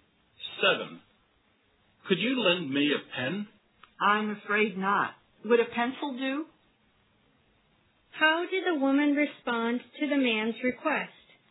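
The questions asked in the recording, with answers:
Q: How did the woman respond to the man's request?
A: She couldn't lend a pen but offered a pencil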